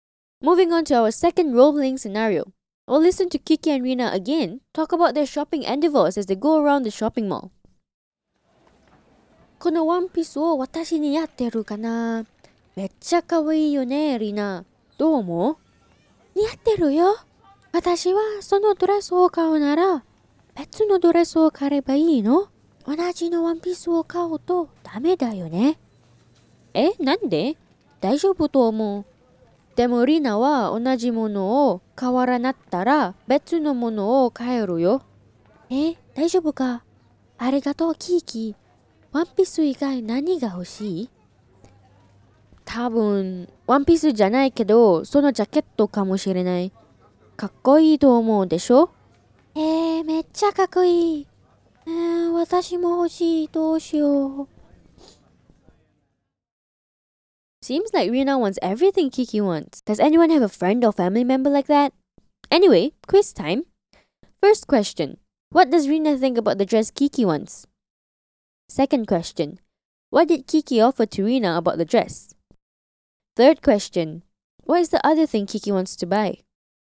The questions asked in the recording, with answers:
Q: What is the other thing Kiki wants to buy?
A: Kiki wants to buy a jacket.